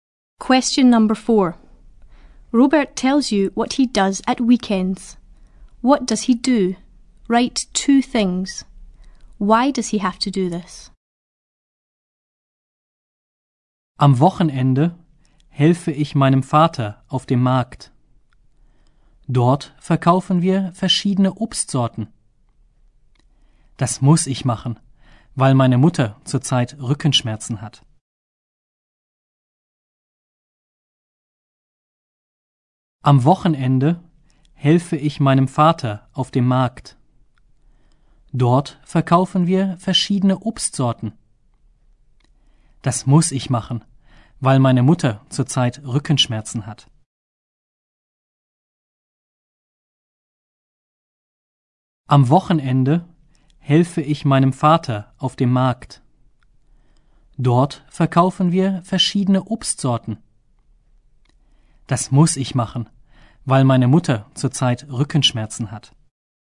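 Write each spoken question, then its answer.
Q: What does he do? Write 2 things.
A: He helps his father at the market; they sell different kinds of fruit

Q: Why does he have to do this?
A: His mother has back pain at the moment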